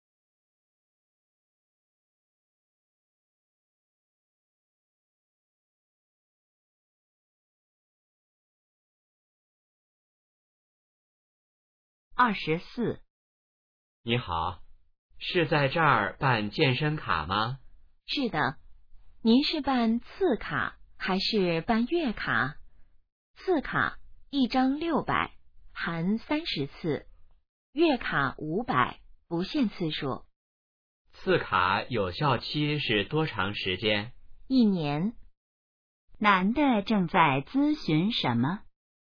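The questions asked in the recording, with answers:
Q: 男的正在咨询什么?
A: 办健身卡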